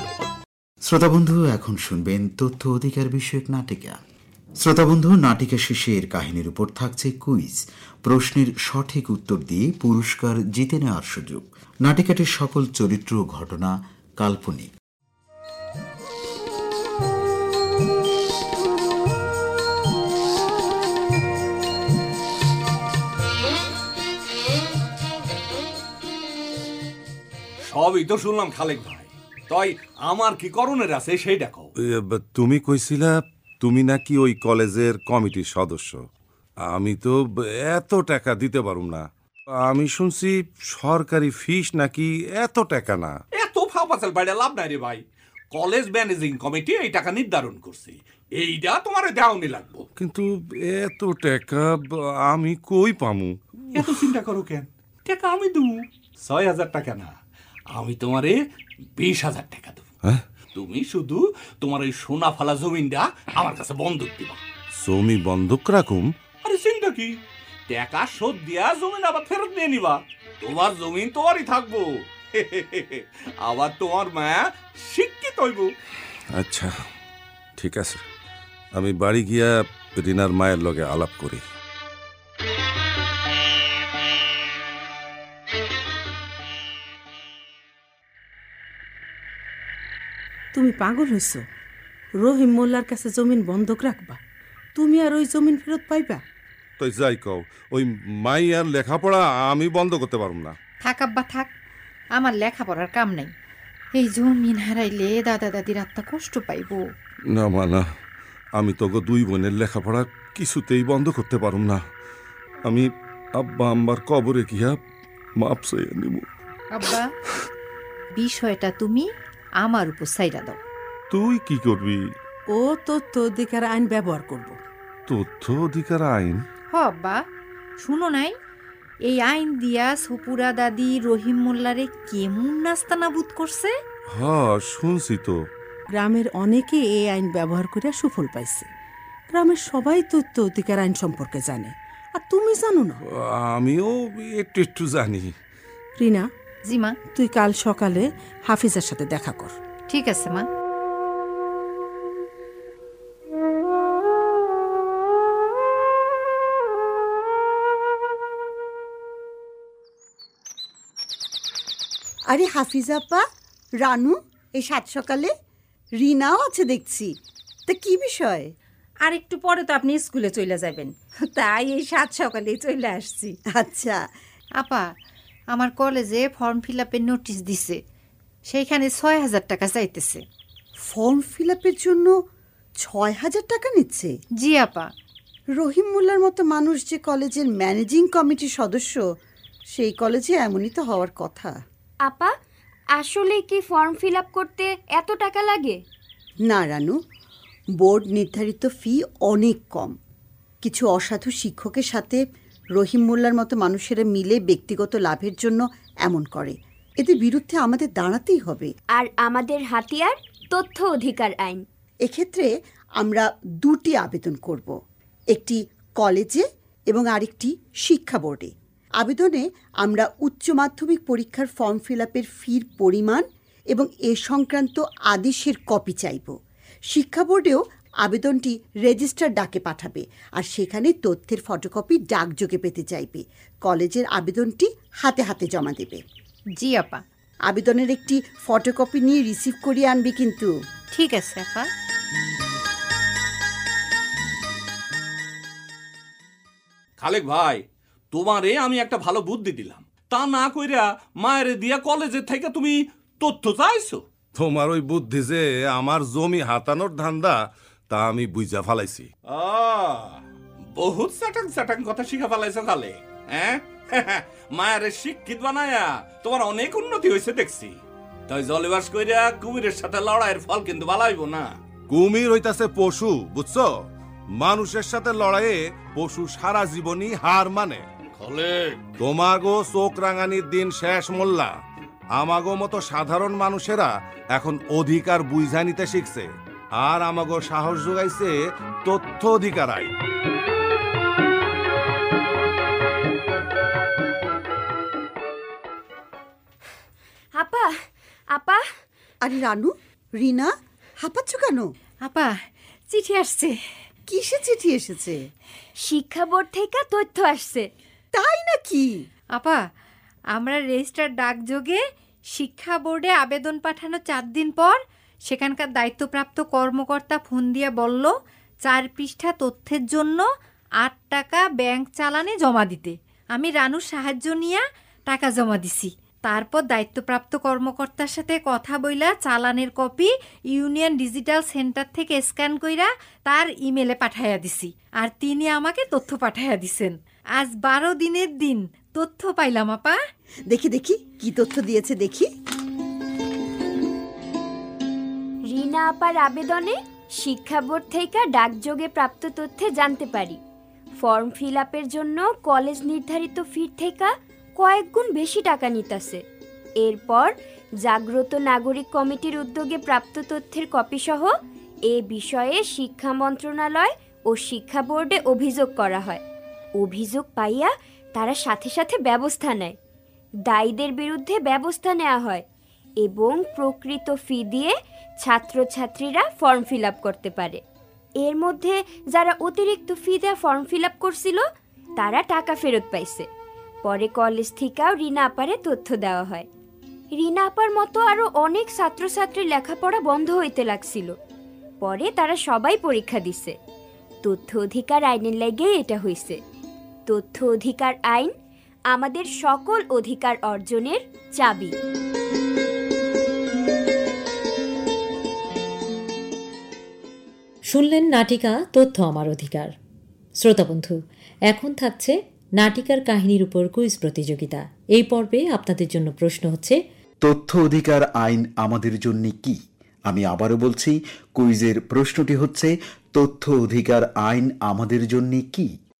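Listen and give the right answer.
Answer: আমাদের সকল অধিকার অর্জনের চাবি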